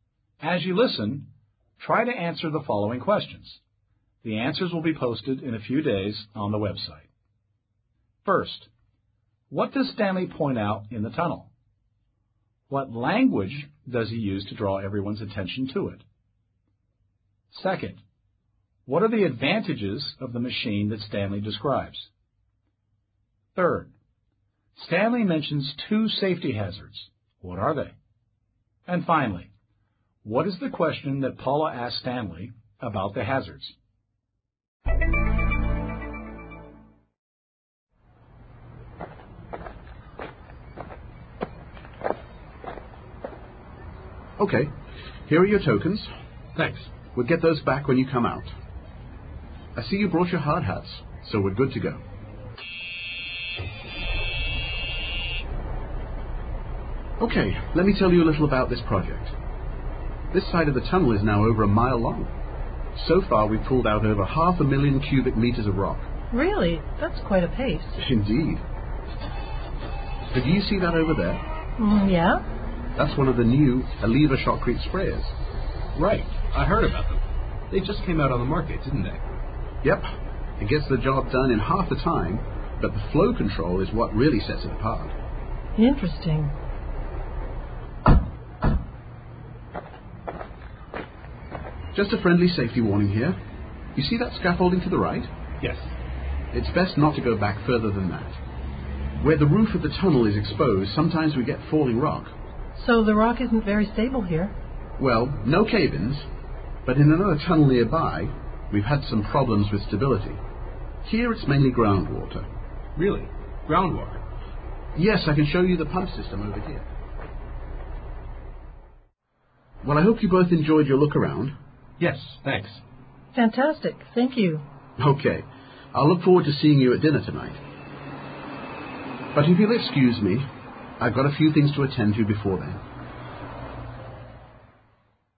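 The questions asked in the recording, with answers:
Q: First, what does Stanley point out in the tunnel?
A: Stanley draws everyone's attention to a piece of heavy equipment, a large machine.

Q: What language does he use to draw everyone's attention to it?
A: To point out this equipment of interest, Stanley says, "Do you see that over there?" and points with his hand.

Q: Second, what are the advantages of the machine that Stanley describes?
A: It does the job in half the time, and its flow control sets it apart

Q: Third, Stanley mentions two safety hazards.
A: Falling rock and groundwater

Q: And finally, what is the question that Paula asked Stanley about the hazards?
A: "So the rock isn't very stable here?"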